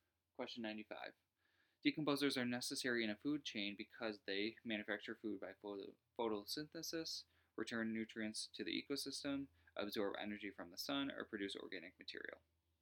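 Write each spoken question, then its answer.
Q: Decomposers are necessary in a food chain because they manufacture food by photosynthesis, return nutrients to the ecosystem, absorb energy from the sun, or produce organic material.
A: 2: return nutrients to the ecosystem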